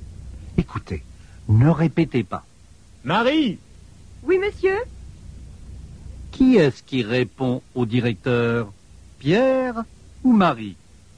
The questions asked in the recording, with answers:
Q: Qui est-ce qui répond au directeur?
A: C'est Marie qui répond au directeur.